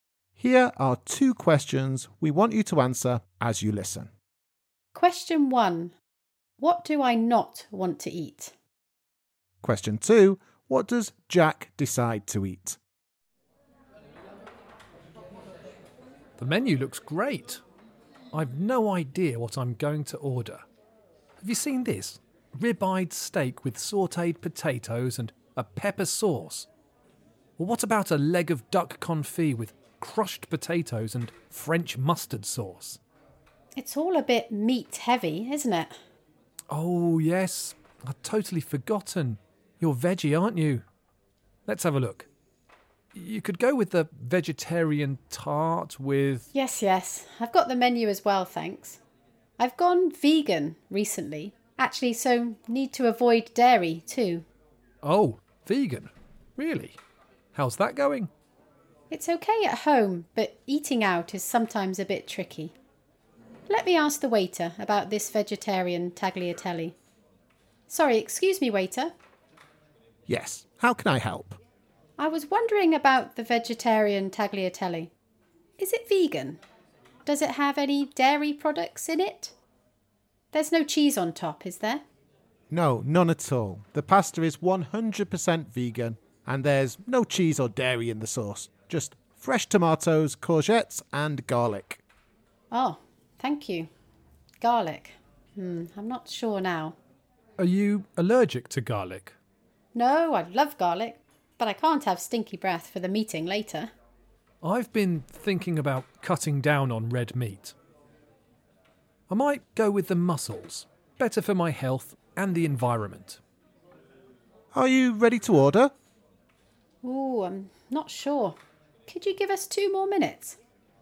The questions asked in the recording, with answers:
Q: What does Jack decide to eat?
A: The answer is mussels.